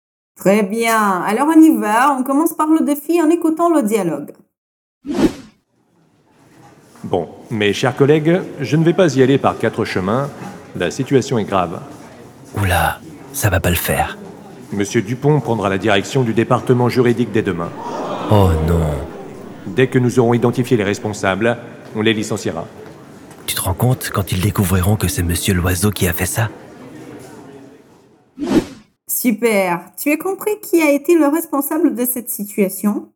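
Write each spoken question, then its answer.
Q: Super, tu as compris qui a été le responsable de cette situation ?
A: Monsieur Loiseau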